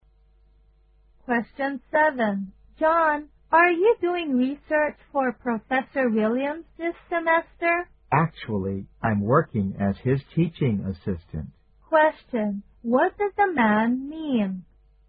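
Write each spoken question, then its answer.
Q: What does the man mean?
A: He is not doing research for Professor Williams; he is his teaching assistant.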